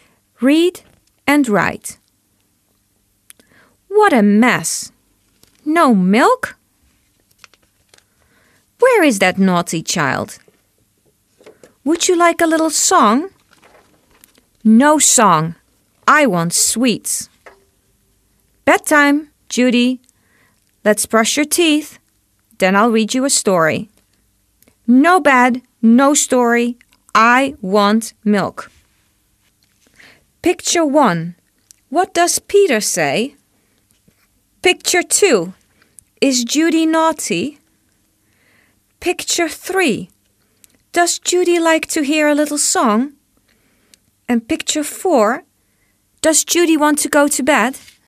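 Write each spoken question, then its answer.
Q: Does Judy like to hear a little song?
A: No

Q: Does Judy want to go to bed?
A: No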